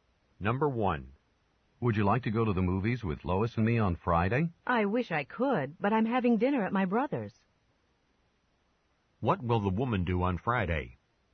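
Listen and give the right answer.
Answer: Have dinner at her brother's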